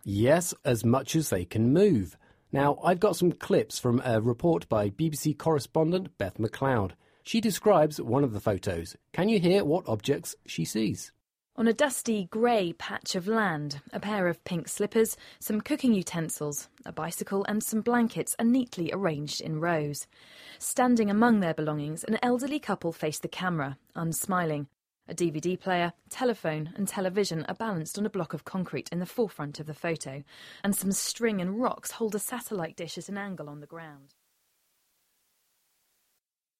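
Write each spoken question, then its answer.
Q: Can you hear what objects she sees?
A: Pink slippers, cooking utensils, a bicycle, blankets, a DVD player, a telephone, a television and a satellite dish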